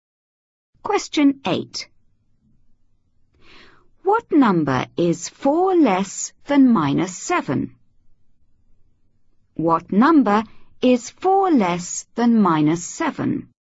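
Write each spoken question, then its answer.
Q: What number is 4 less than minus 7?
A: -11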